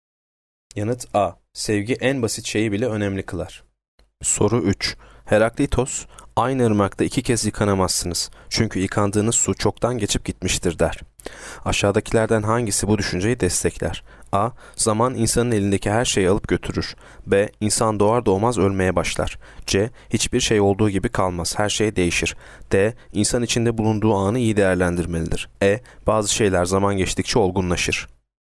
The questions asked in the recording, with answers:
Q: Aşağıdakilerden hangisi bu düşünceyi destekler?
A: Yanıt C. Hiçbir şey olduğu gibi kalmaz.